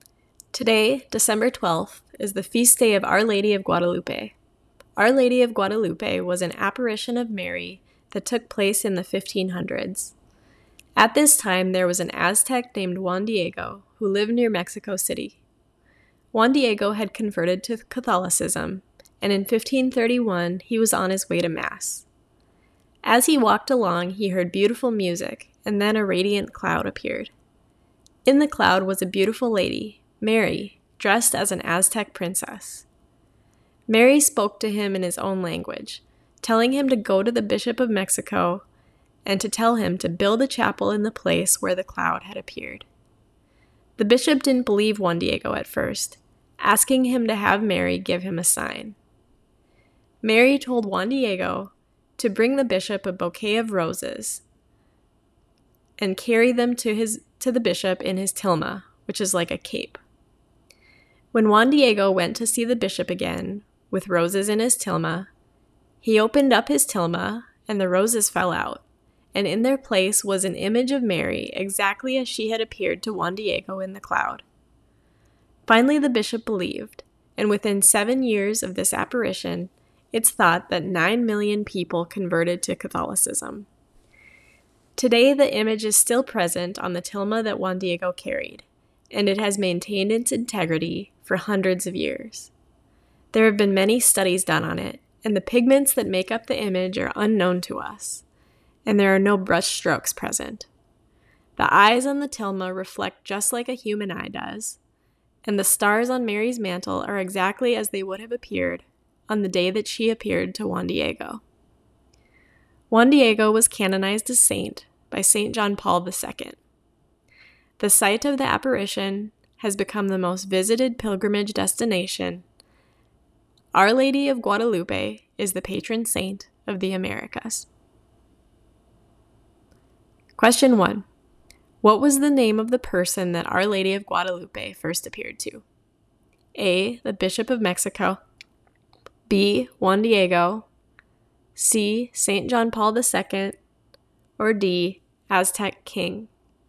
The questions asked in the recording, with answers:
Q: What was the name of the person that Our Lady of Guadalupe first appeared to?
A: The answer is B. Our Lady of Guadalupe first appeared to Juan Diego.